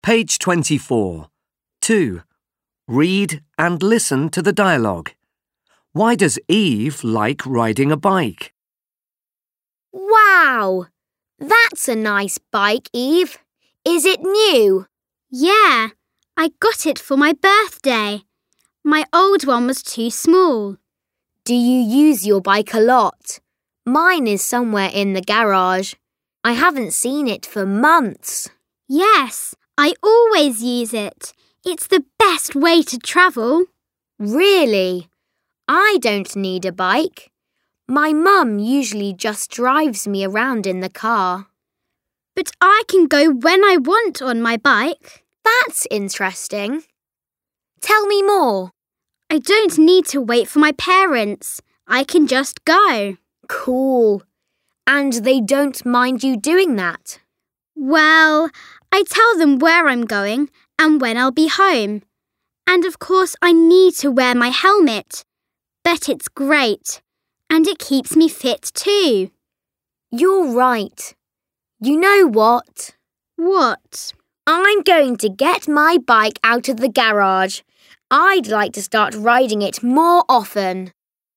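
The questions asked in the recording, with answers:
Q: Why does Eve like riding a bike?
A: She can go when she wants without waiting for her parents, and it keeps her fit.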